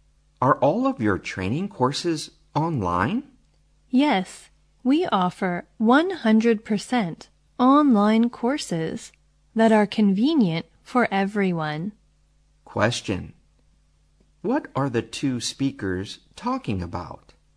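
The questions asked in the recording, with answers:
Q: What are the two speakers talking about?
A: Online training courses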